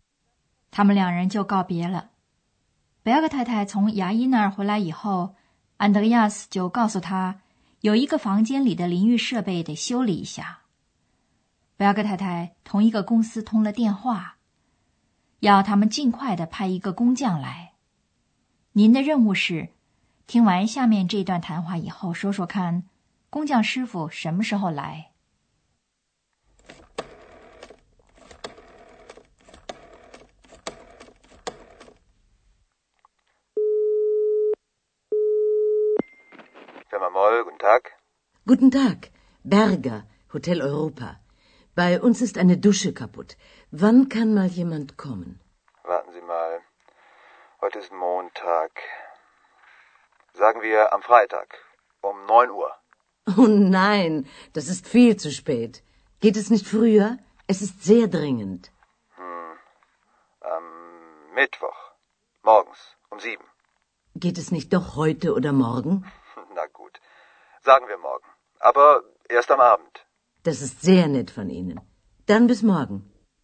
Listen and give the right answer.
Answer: 最后,那位师傅还是按照贝尔格太太的要求,在第二天晚上来。